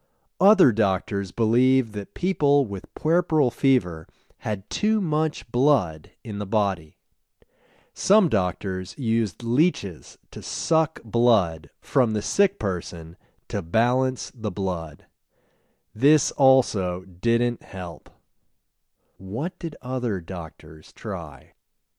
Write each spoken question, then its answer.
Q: What did other doctors try?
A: Other doctors used leeches to suck blood from the sick person.